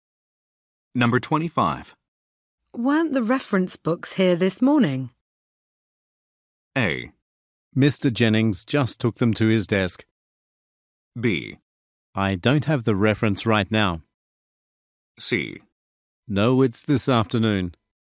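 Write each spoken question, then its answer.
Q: Weren't the reference books here this morning?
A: A: Mr. Jennings just took them to his desk.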